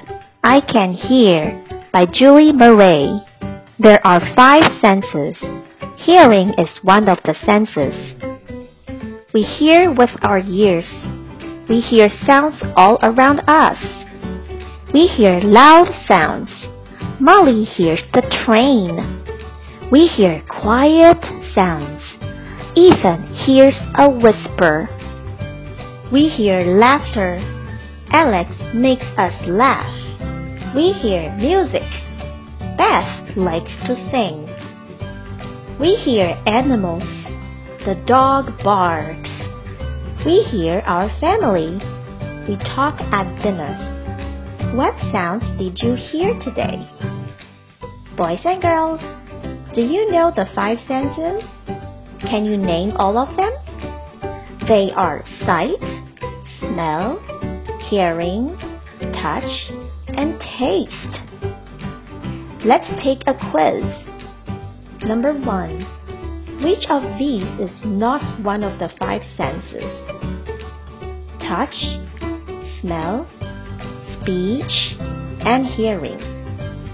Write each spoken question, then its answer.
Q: which of these is not one of the five senses?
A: That's right, speech.